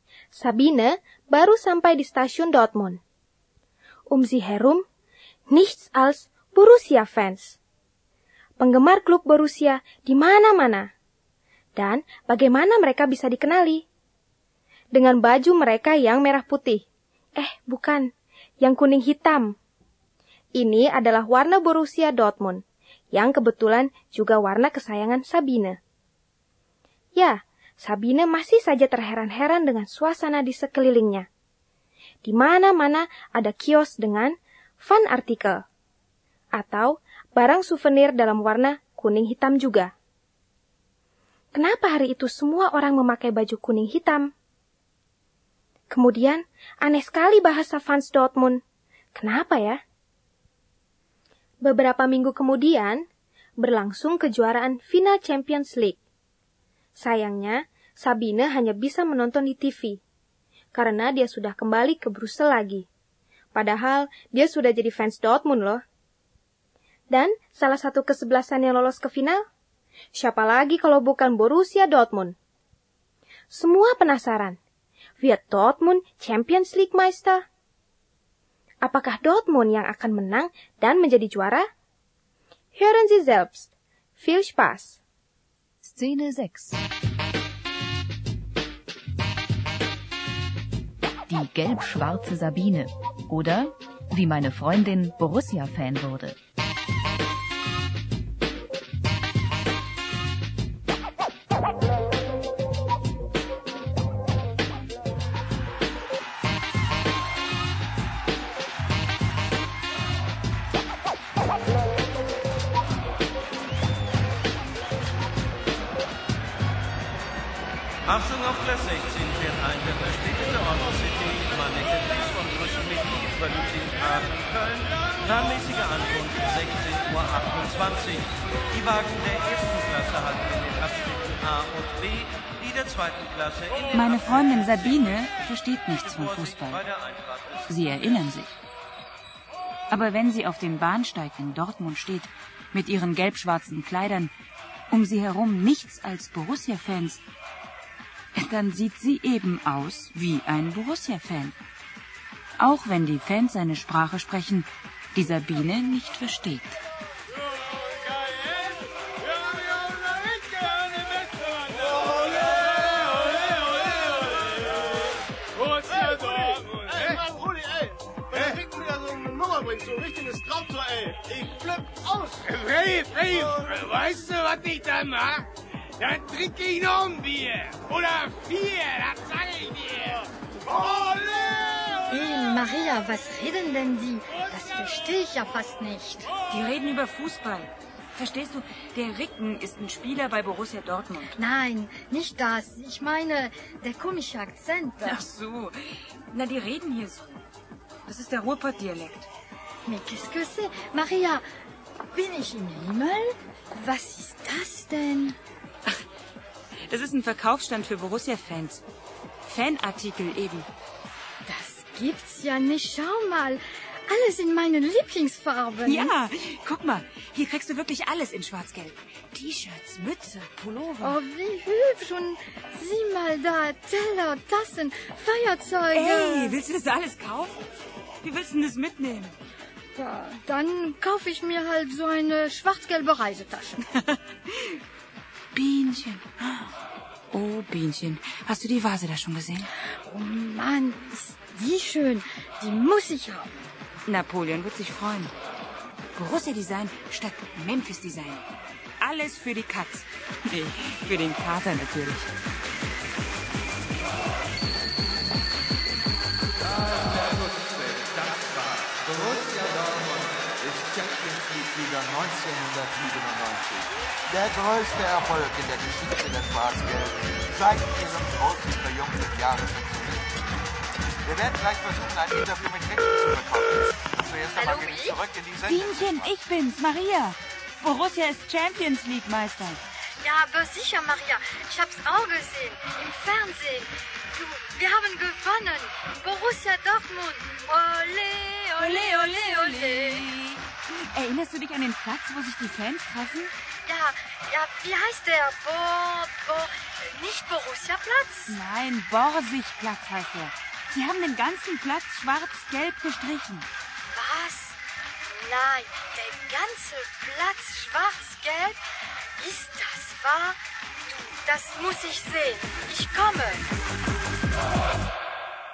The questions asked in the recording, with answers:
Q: Kenapa ya?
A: dia tidak mengerti bahasa fans Dortmund karena mereka memakai dialek.

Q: Wird Dortmund Champions League Meister?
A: Borussia Dortmund ist Champions League Meister.